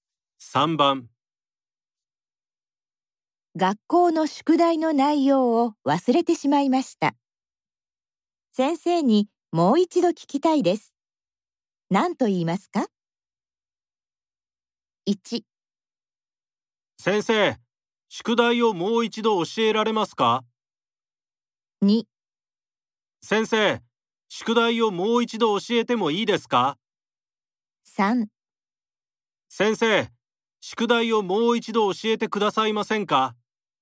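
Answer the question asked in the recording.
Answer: 3: 先生、宿題をもう一度教えてくださいませんか?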